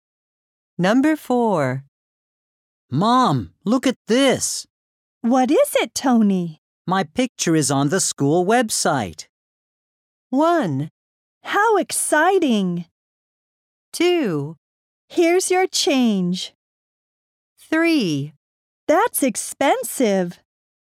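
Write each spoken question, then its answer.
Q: My picture is on the school website.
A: 1: How exciting.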